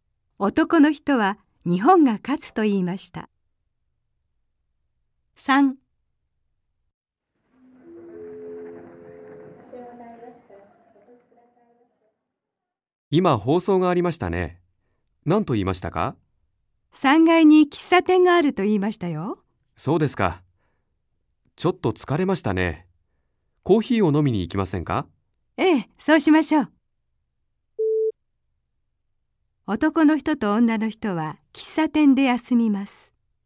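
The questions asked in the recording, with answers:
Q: 男の人と女の人は喫茶店で休みます。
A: はい(○)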